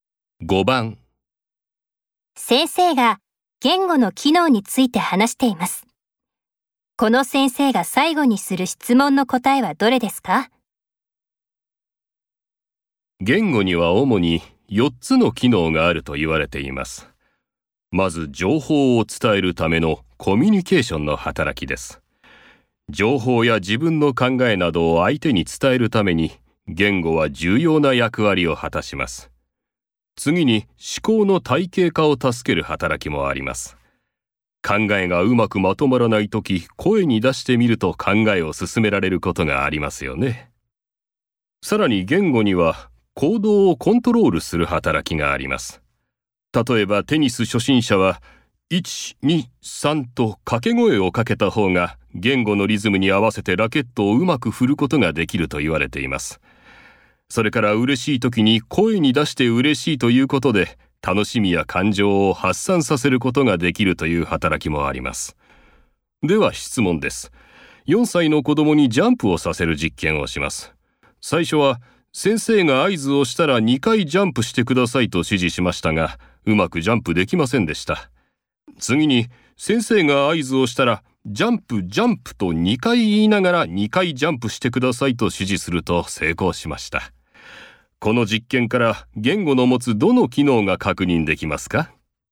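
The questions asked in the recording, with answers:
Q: この実験から言語の持つどの機能が確認できますか?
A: 行動をコントロールする働き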